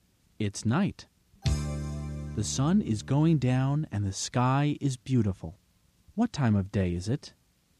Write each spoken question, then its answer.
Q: What time of day is it?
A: It's evening.